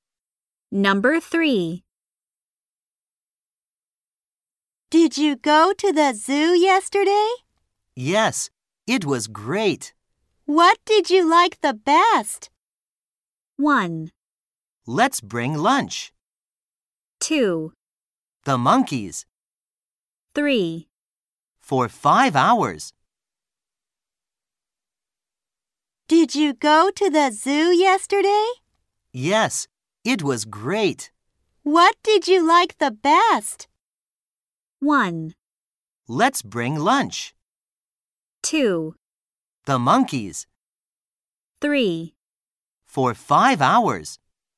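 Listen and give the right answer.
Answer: 2: The monkeys.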